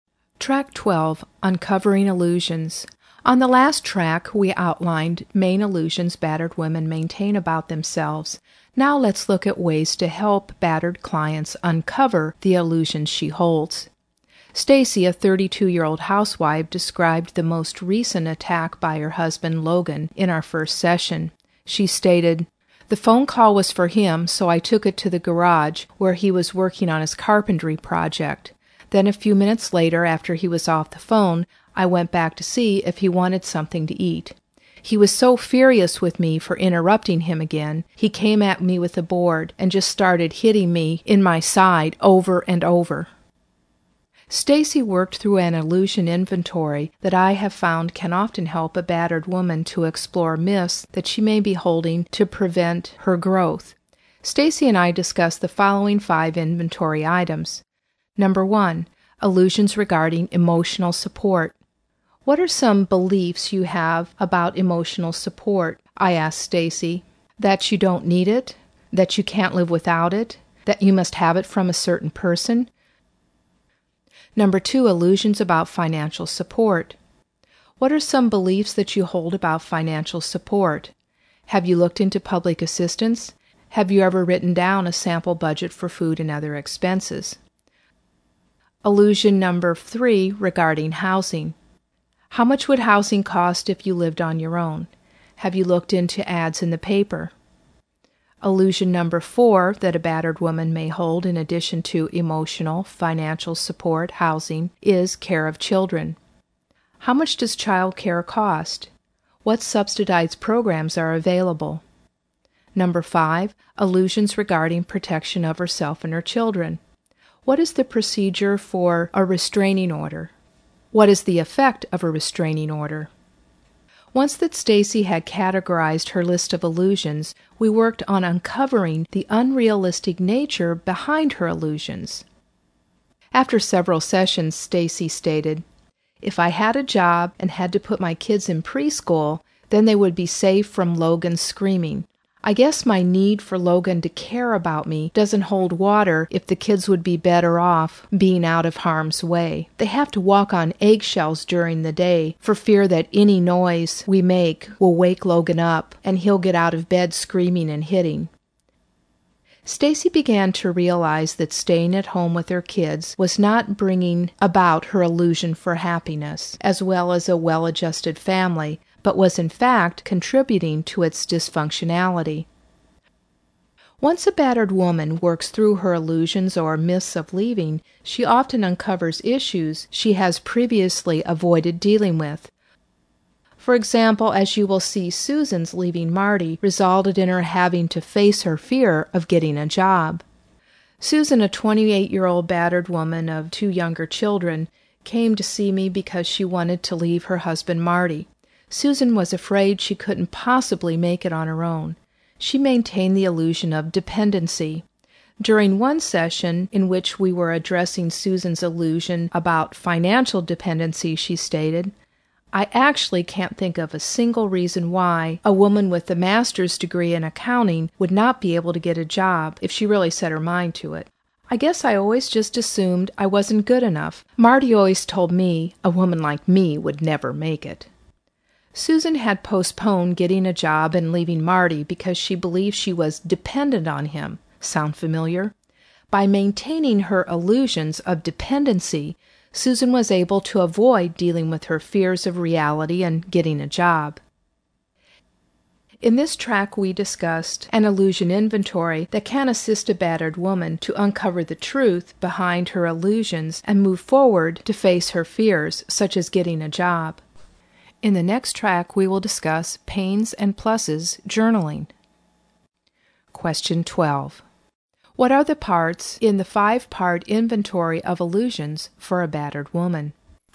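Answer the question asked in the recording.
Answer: Emotional support, financial support, housing, care of children, and protection of herself and her children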